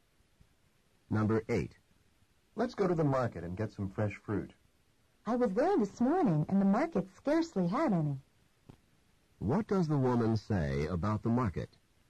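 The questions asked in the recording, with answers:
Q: What does the woman say about the market?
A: The market had almost no fresh fruit.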